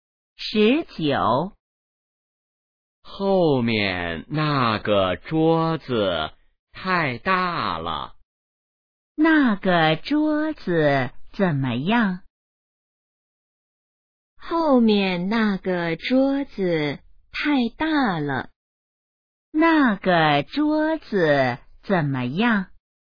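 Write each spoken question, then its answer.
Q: 那个桌子怎么样?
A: 太大了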